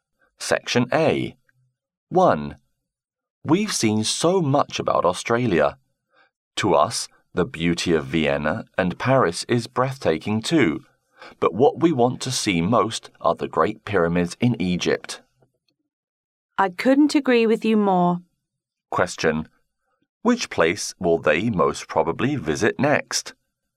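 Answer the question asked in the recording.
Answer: The Great Pyramids in Egypt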